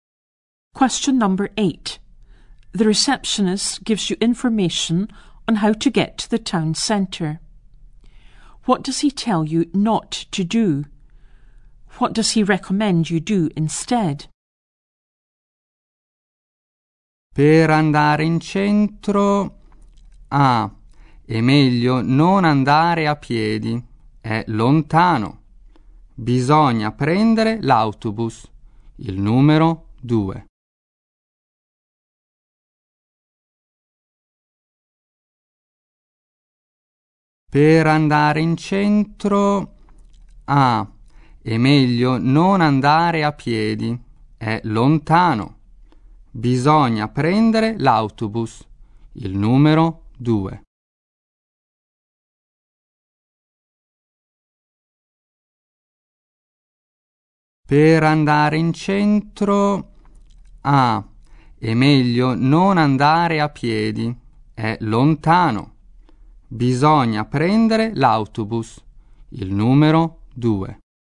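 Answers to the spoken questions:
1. Not to walk there
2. Take the number 2 bus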